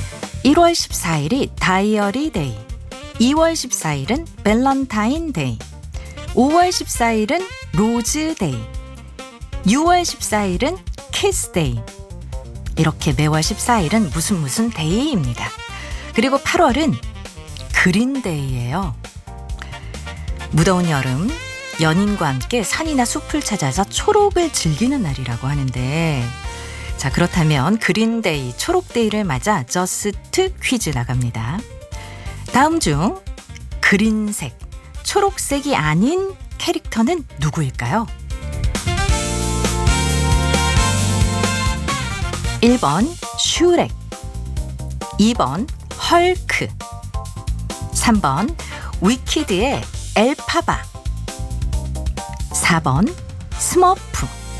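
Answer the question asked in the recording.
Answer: 4: 스머프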